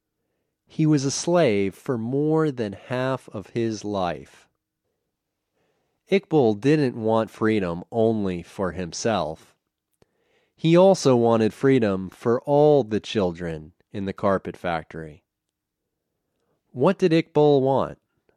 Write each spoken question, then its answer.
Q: What did Iqbal want?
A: Iqbal wanted freedom for all the children in the carpet factory.